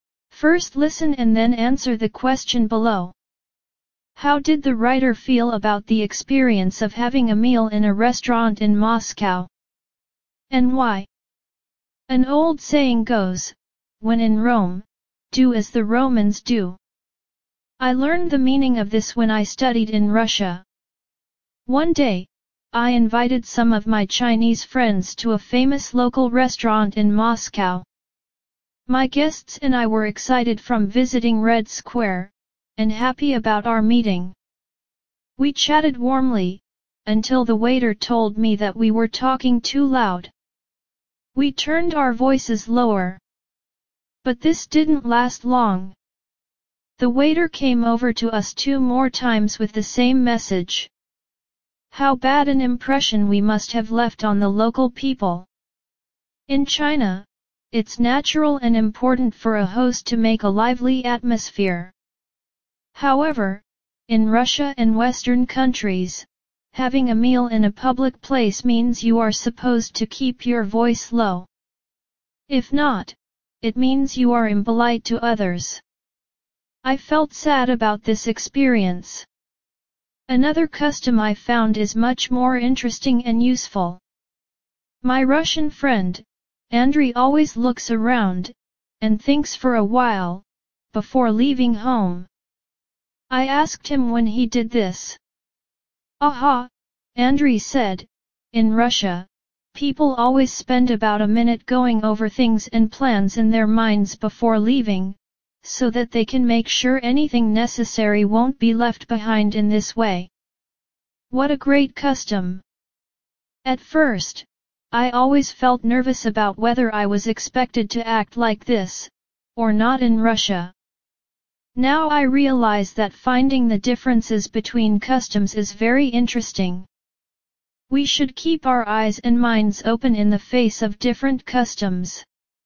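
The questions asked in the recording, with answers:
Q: How did the writer feel about the experience of having a meal in a restaurant in Moscow? And why?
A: He felt sad, because they talked too loudly, which is impolite in Russia, and left a bad impression on the local people.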